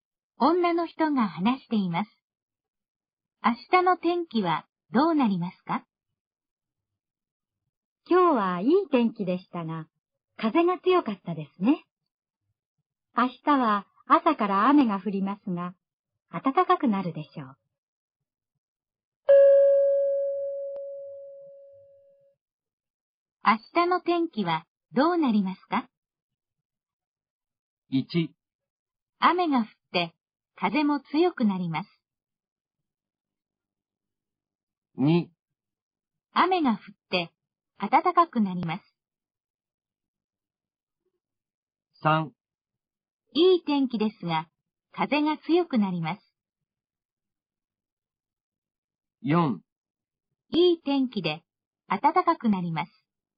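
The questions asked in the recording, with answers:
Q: 明日の天気はどうなりますか?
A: 2: 雨が降って暖かくなります。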